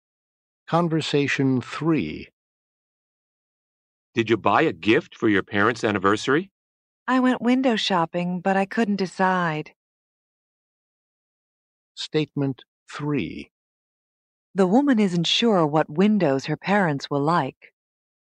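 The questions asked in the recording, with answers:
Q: The woman isn't sure what windows her parents will like.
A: False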